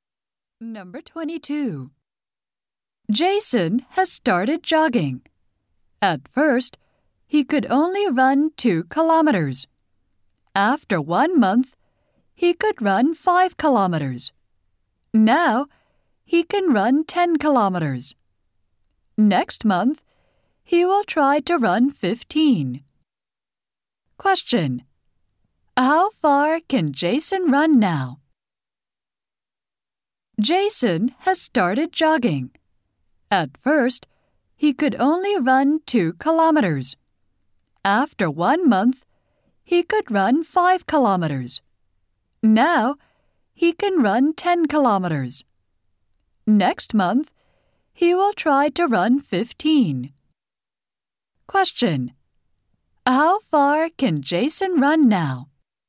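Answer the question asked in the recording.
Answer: 10 kilometers.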